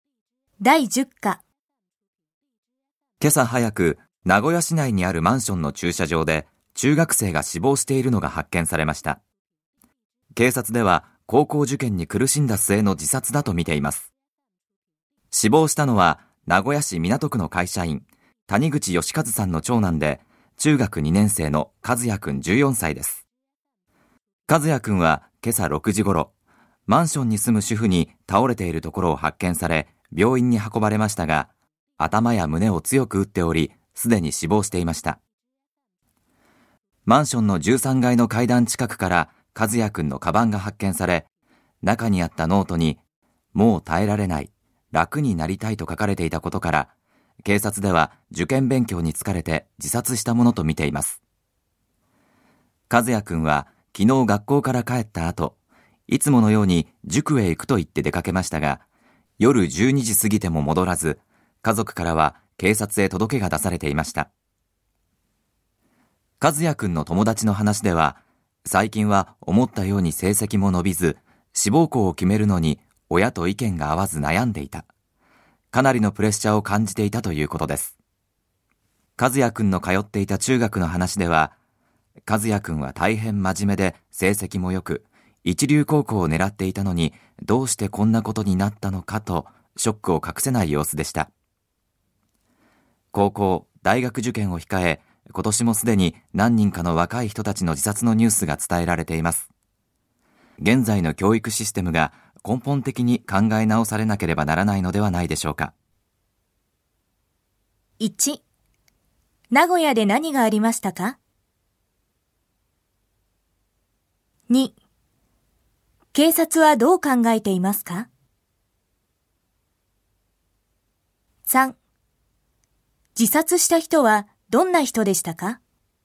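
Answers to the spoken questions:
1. マンションの駐車場で中学生が死亡しているのが発見された
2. 受験勉強に疲れて自殺したとみている
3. 中学2年生の14歳の男子で、真面目で成績も良く一流高校を狙っていた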